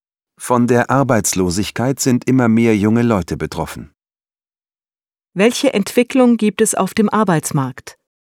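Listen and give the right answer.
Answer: Immer mehr junge Leute sind arbeitslos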